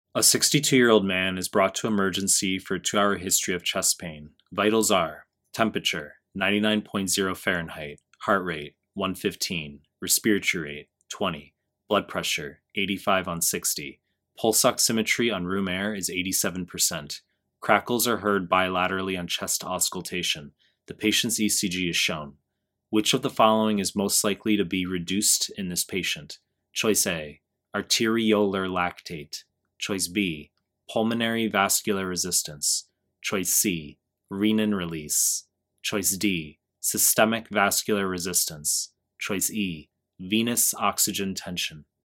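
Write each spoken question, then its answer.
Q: Which of the following is most likely to be reduced in this patient?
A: E: venous oxygen tension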